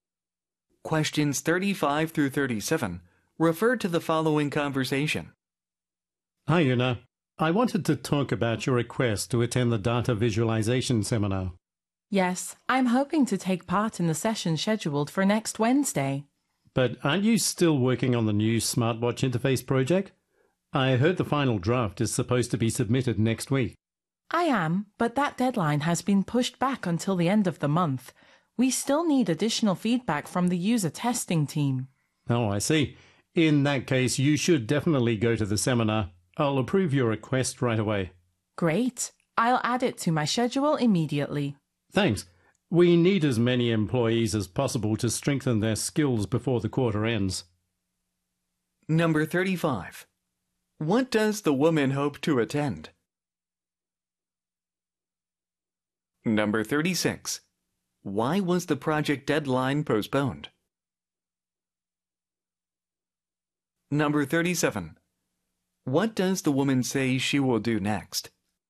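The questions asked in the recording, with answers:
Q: What does the woman hope to attend?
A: A data visualization seminar

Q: Why was the project deadline postponed?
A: Additional feedback is needed from the user testing team

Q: What does the woman say she will do next?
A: Add the seminar to her schedule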